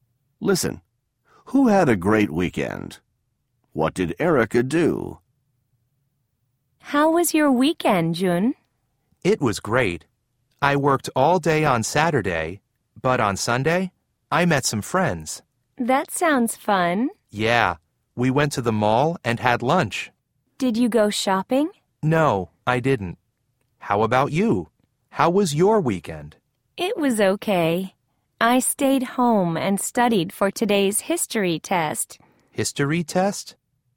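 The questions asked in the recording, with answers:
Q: Who had a great weekend?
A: Jun

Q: What did Erica do?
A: She stayed home and studied for a history test.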